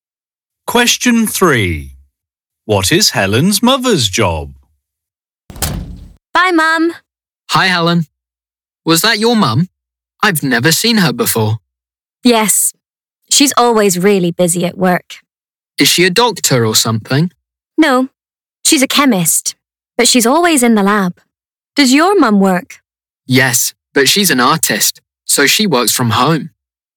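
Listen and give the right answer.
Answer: She's a chemist.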